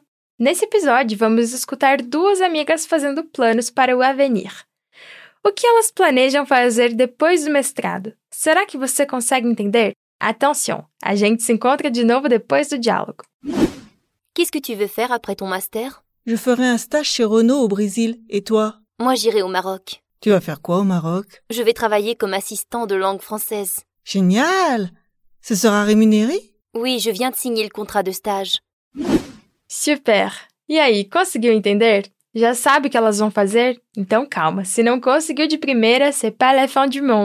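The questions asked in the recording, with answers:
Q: O que elas planejam fazer depois do mestrado?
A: Uma vai fazer um estágio na Renault no Brasil; a outra vai trabalhar como assistente de língua francesa no Marrocos.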